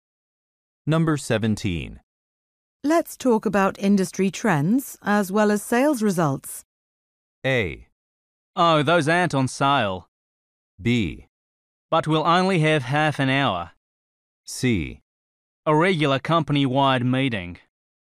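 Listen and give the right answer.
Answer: B: But we'll only have half an hour.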